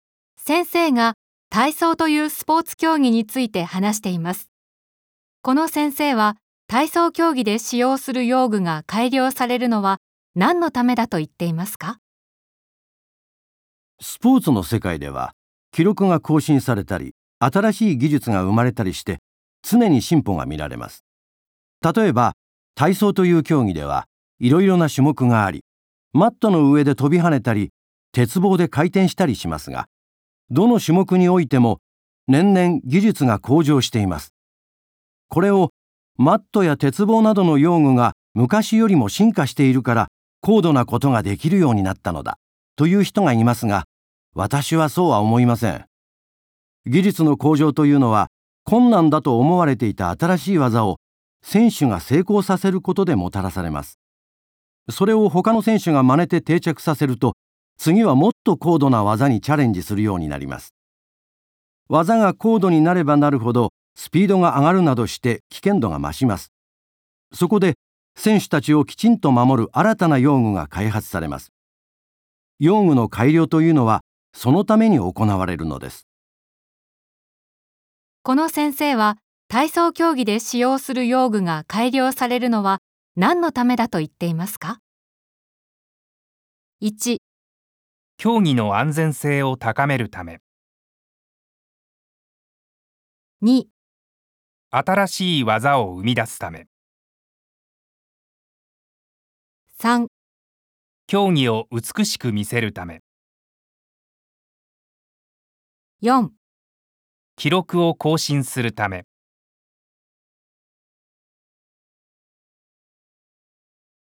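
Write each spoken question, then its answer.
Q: この先生は体操競技で使用する用具が改良されるのは何のためだと言っていますか?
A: 1: 競技の安全性を高めるため。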